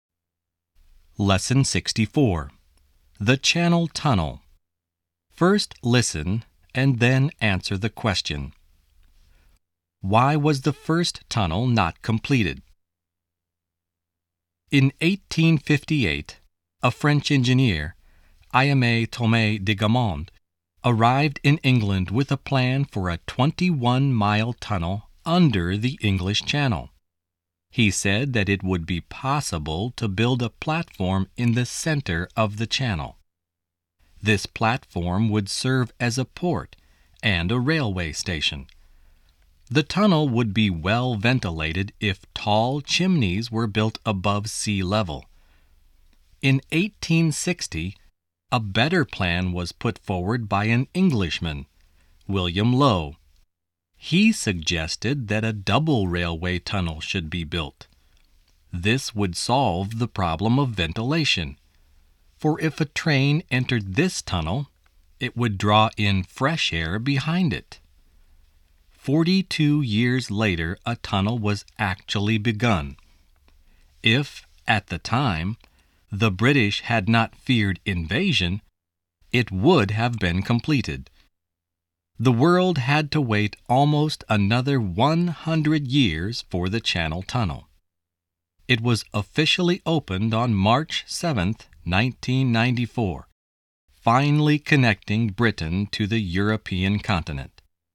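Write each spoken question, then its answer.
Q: Why was the first tunnel not completed?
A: Because the British feared invasion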